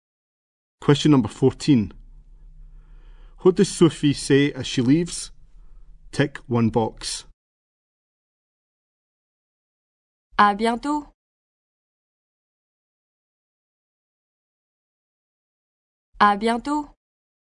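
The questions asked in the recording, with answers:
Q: What does Sophie say as she leaves?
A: See you soon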